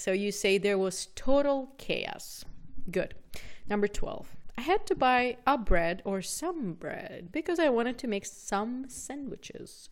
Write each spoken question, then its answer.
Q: I had to buy a bread or some bread because I wanted to make some sandwiches.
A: So we say, I had to buy some bread because I wanted to make some sandwiches.